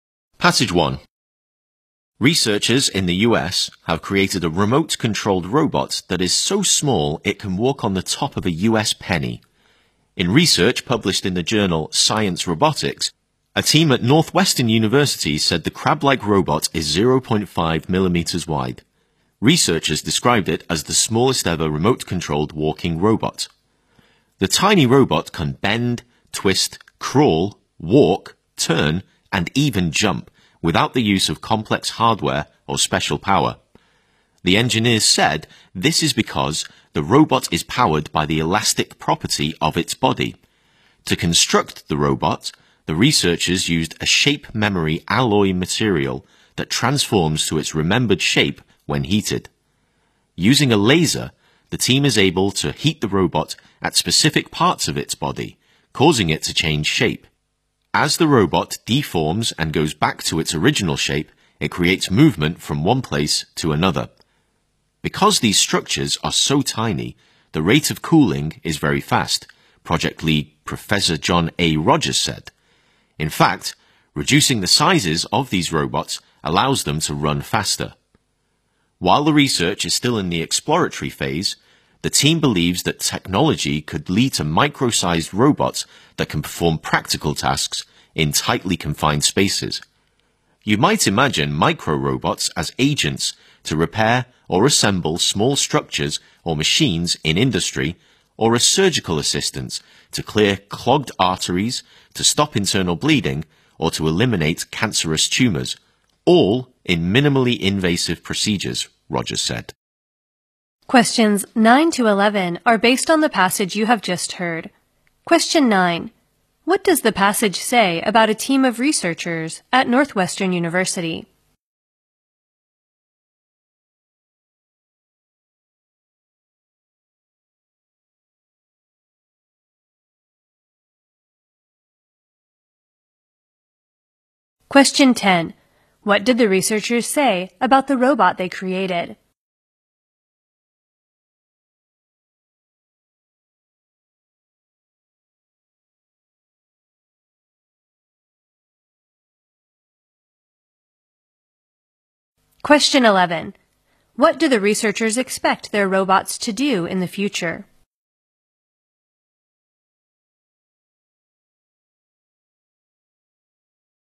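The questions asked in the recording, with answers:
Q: What does the passage say about a team of researchers at Northwestern University?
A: They created the smallest ever remote-controlled walking robot

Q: What did the researchers say about the robot they created?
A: It is powered by the elastic property of its body, with no complex hardware or special power

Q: What do the researchers expect their robots to do in the future?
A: Perform practical tasks in tightly confined spaces, such as repairing small machines or assisting in surgery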